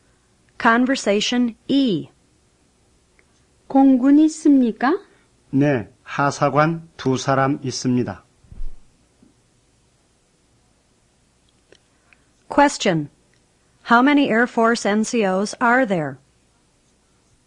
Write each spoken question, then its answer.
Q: How many Air Force NCOs are there?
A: There are two Air Force NCOs.